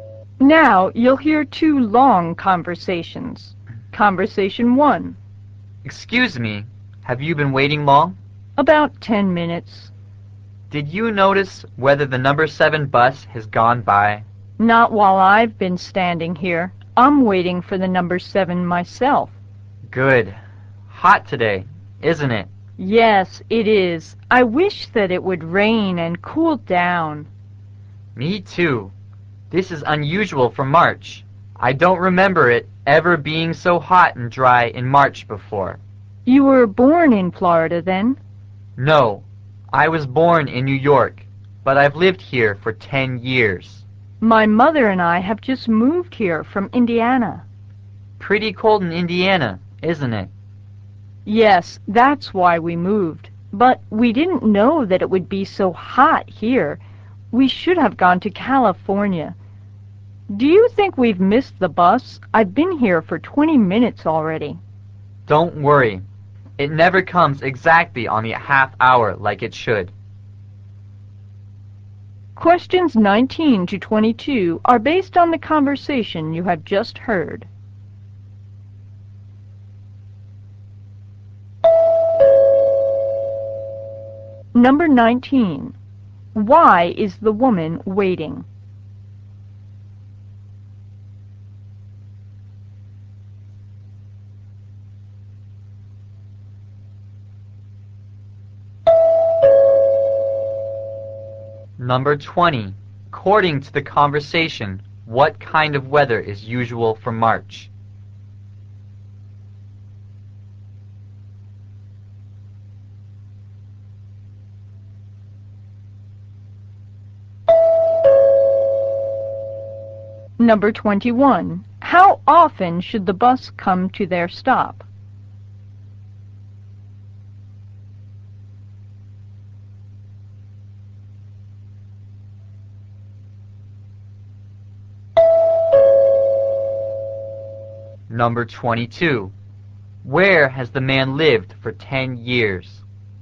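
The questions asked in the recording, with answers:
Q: Why is the woman waiting?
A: She is waiting for the number 7 bus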